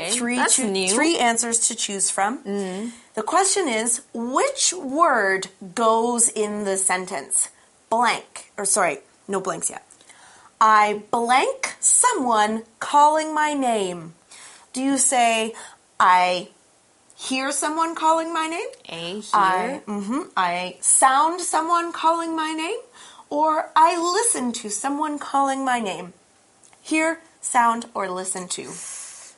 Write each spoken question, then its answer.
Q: The question is, which word goes in the sentence?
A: You hear someone calling your name.